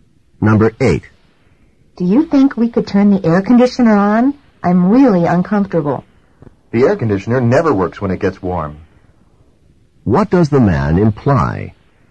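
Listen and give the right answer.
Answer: Turning on the air conditioner won't help because it doesn't work when it's warm.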